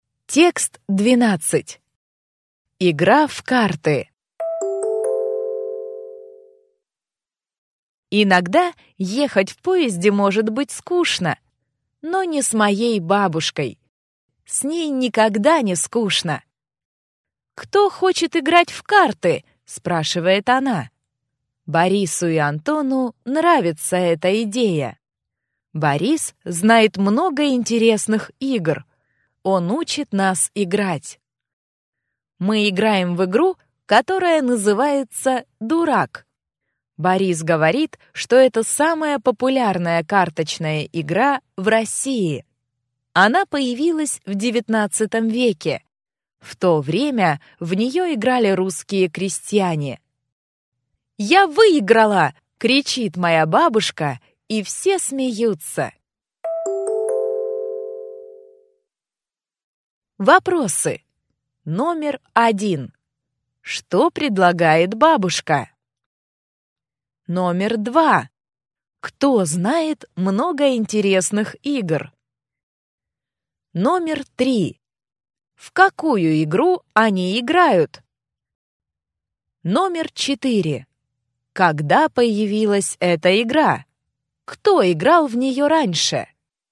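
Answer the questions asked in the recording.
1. Играть в карты
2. Борис
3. «Дурак»
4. В XIX веке; русские крестьяне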